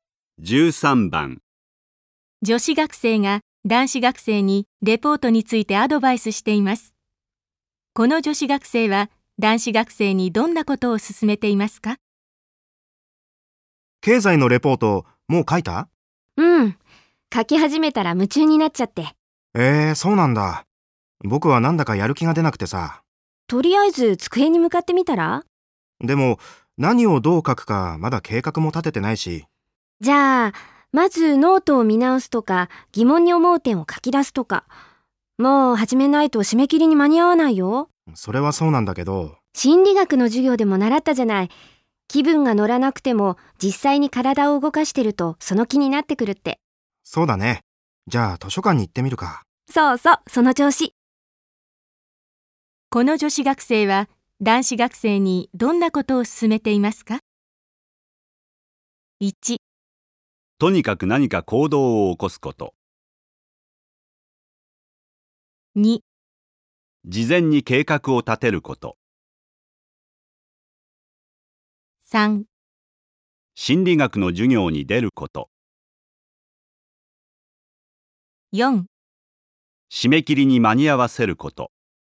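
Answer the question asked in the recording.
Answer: 1: とにかく何か行動を起こすこと。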